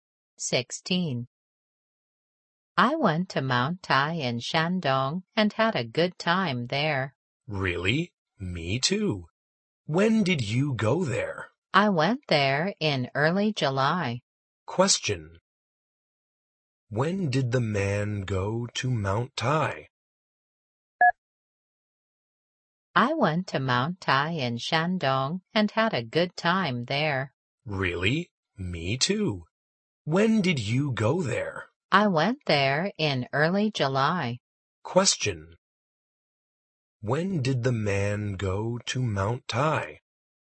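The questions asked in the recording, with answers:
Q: When did the man go to Mount Tai?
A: In early July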